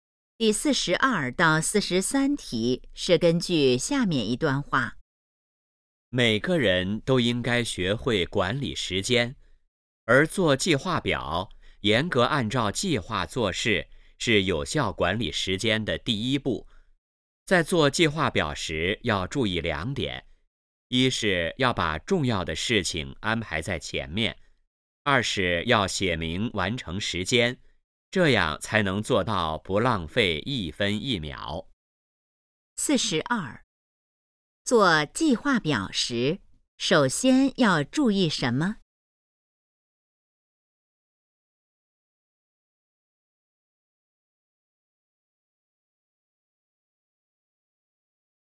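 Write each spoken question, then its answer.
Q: 做计划表时,首先要注意什么?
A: 把重要的事情安排在前面

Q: 这段话主要谈的是什么?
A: 如何管理时间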